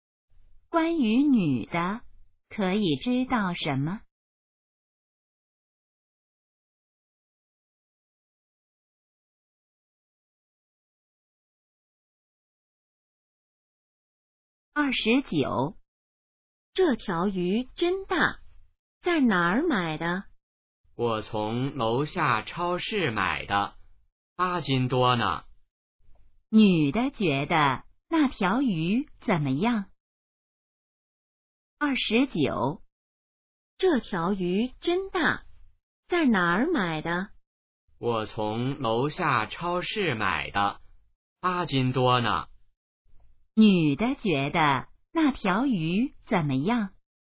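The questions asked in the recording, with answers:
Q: 女的觉得那条鱼怎么样?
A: 很大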